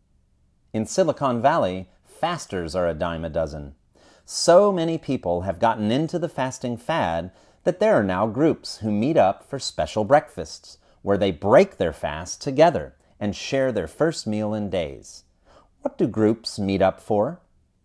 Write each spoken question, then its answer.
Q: What do groups meet up for?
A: Groups meet up for special breakfasts.